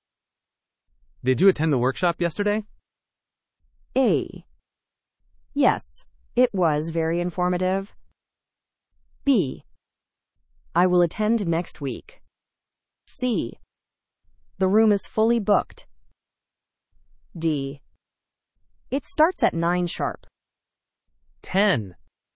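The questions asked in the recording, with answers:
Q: Did you attend the workshop yesterday?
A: A: Yes, it was very informative.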